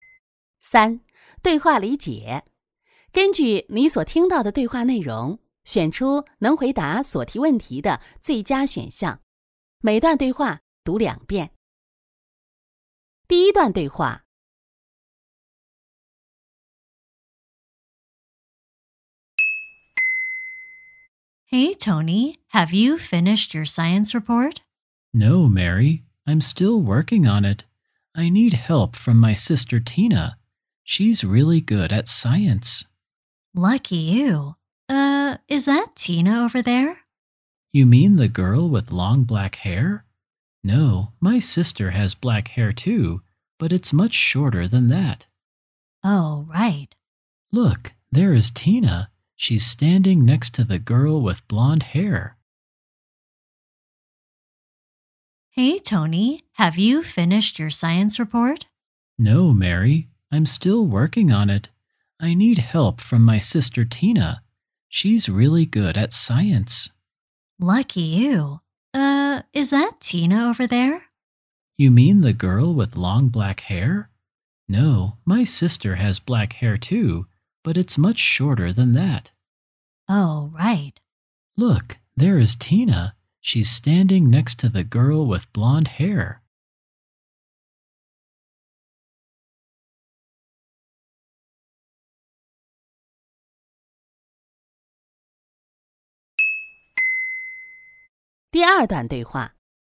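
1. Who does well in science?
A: Tina.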